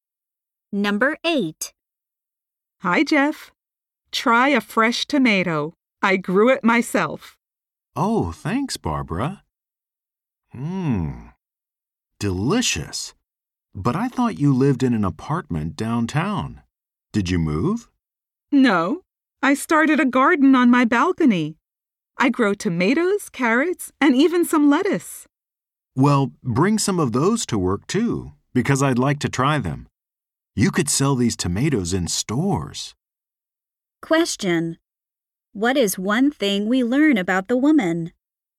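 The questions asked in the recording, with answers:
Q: What is one thing we learn about the woman?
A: She grows vegetables in a garden on her apartment balcony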